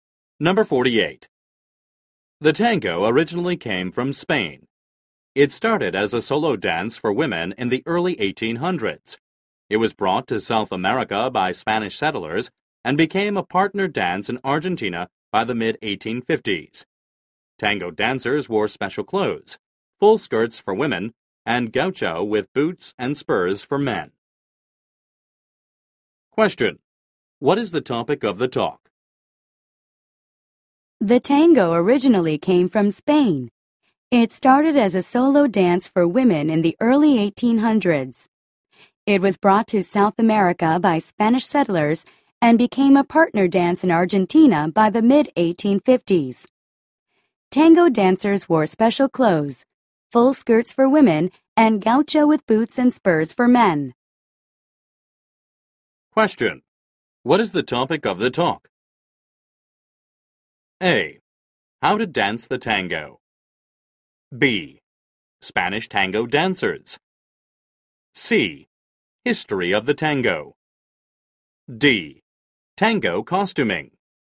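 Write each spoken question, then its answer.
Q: What is the topic of the talk?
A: C: History of the tango.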